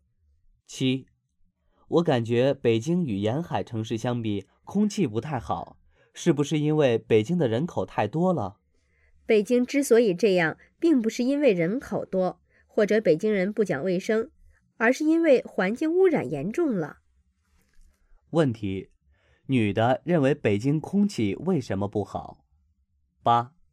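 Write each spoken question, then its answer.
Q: 女的认为北京空气为什么不好?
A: 因为环境污染严重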